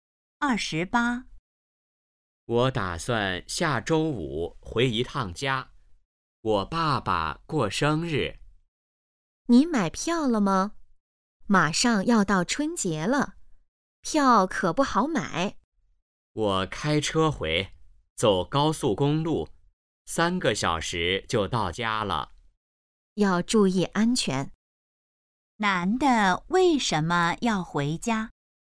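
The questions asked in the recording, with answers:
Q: 男的为什么要回家?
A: 爸爸过生日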